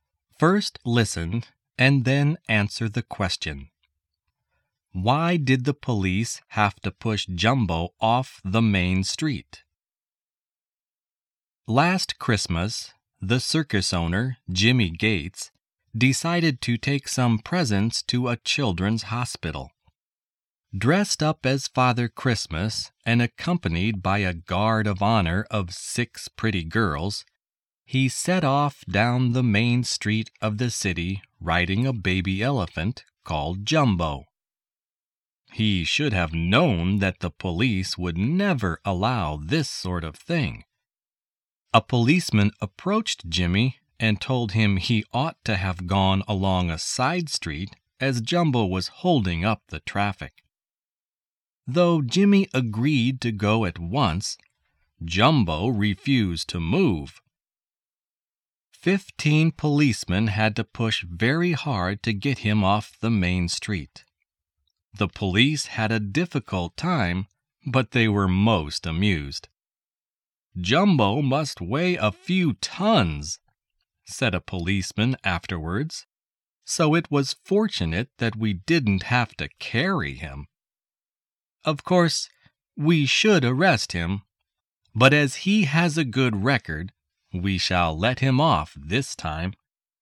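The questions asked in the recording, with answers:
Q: Why did the police have to push Jumbo off the main street?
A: Because Jumbo was holding up the traffic and refused to move.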